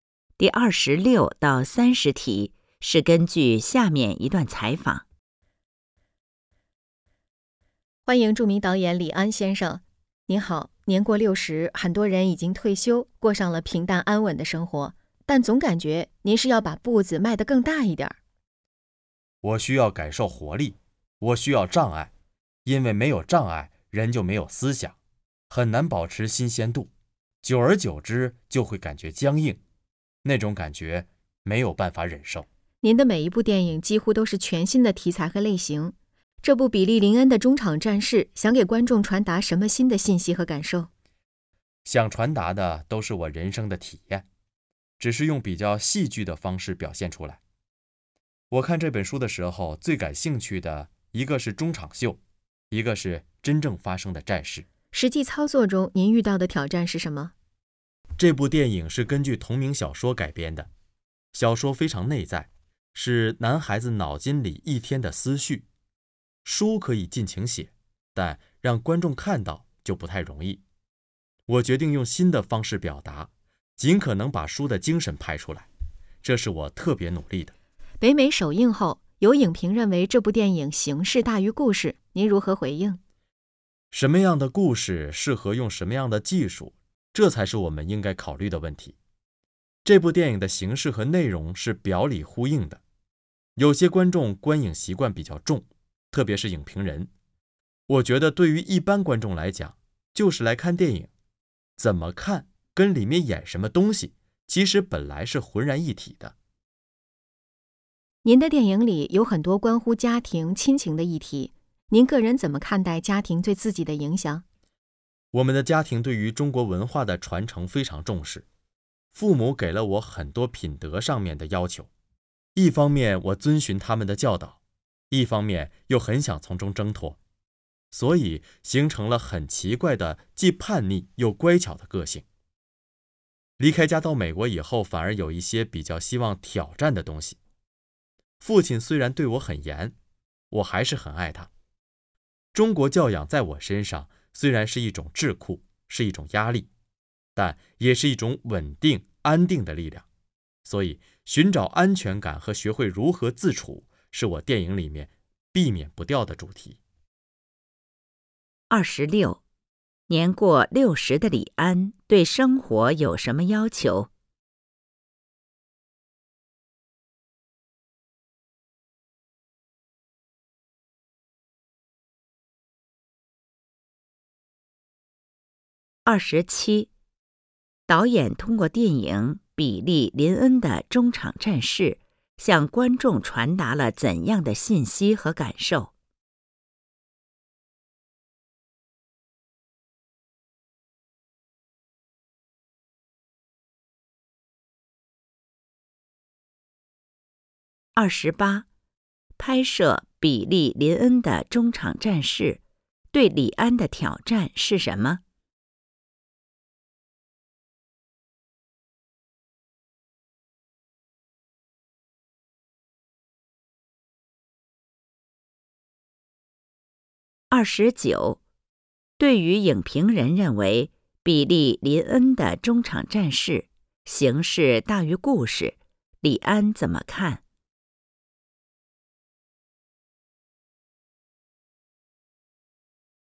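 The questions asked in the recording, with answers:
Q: 年过60的李安对生活有什么要求?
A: 需要感受活力,需要障碍

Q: 导演通过电影《比利·林恩的中场战事》向观众传达了怎样的信息和感受?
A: 他的人生体验

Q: 拍摄《比利·林恩的中场战事》对李安的挑战是什么?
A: 把小说中男孩内在的思绪用新的方式拍出来让观众看到

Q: 对于影评人认为比利·林恩的中场战事形式大于故事,李安怎么看?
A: 形式和内容是表里呼应的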